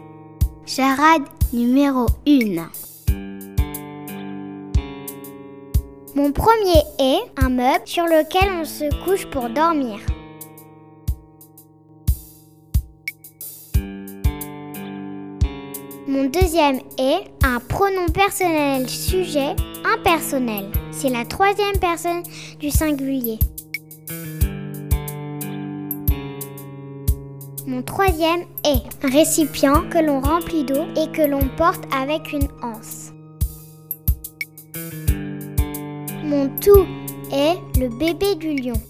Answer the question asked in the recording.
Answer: La bonne réponse est le lionceau.